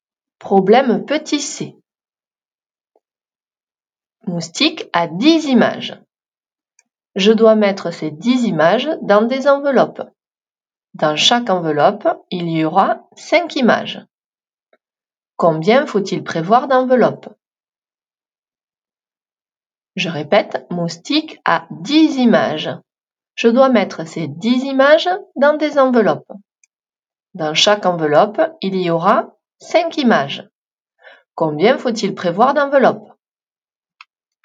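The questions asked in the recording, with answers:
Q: Combien faut-il prévoir d'enveloppes?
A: 2 enveloppes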